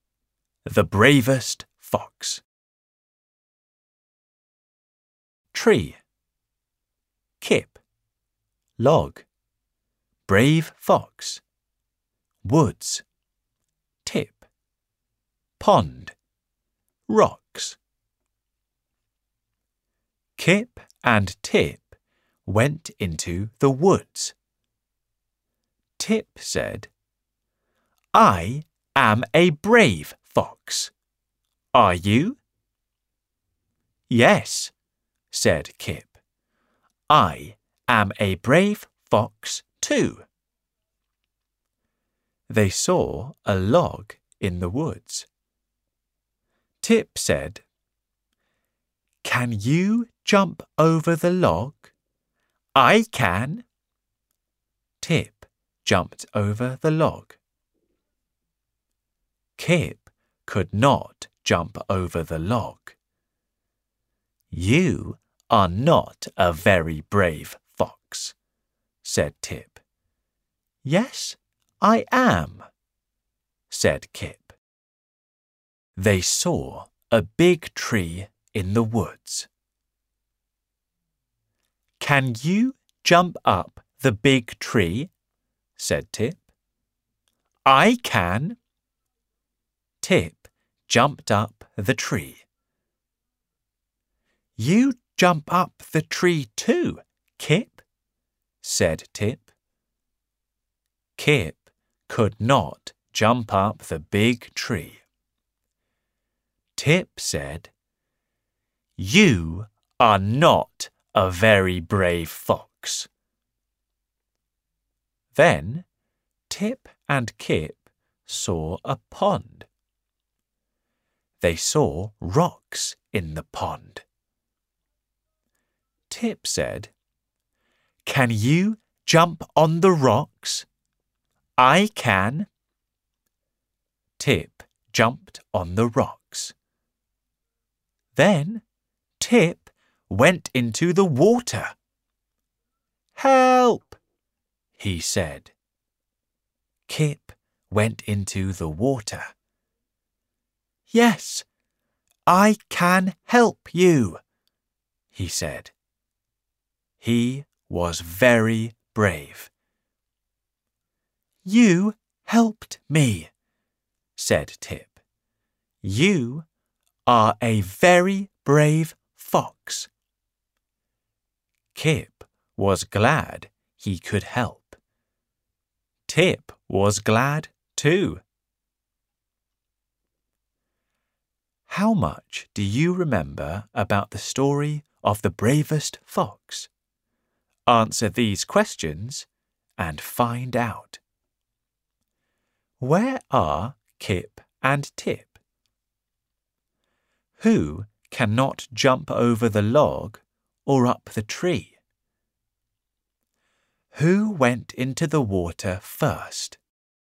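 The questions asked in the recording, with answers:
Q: Where are Kip and Tip?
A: In the woods

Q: Who cannot jump over the log or up the tree?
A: Kip

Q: Who went into the water first?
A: Tip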